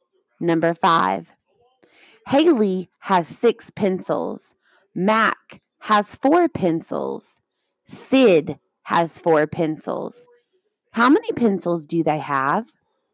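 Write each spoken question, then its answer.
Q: How many pencils do they have?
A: 14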